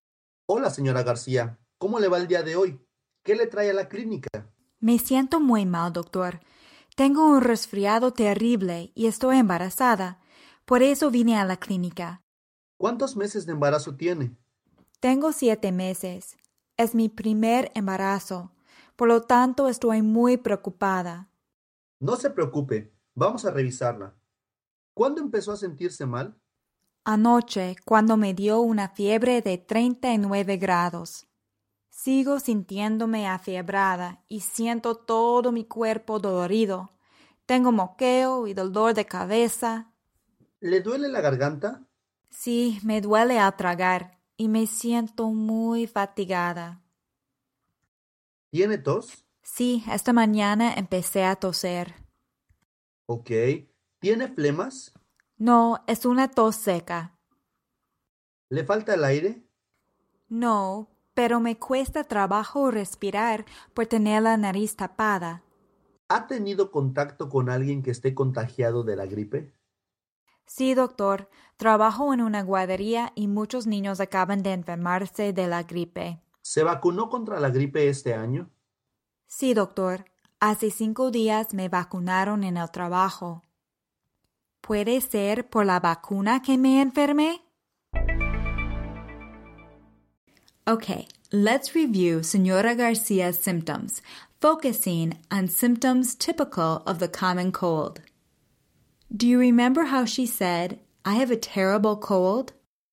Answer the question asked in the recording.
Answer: Tengo un resfriado terrible.